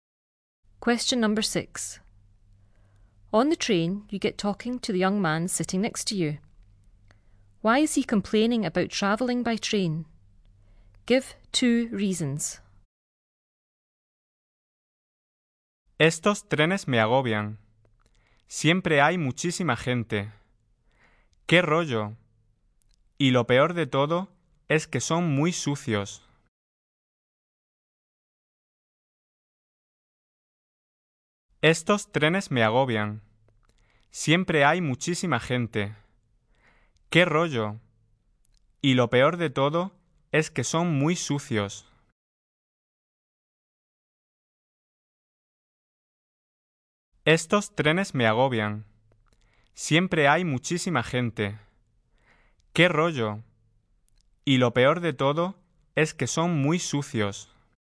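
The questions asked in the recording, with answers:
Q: Why is he complaining about travelling by train?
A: They are always very crowded and they are very dirty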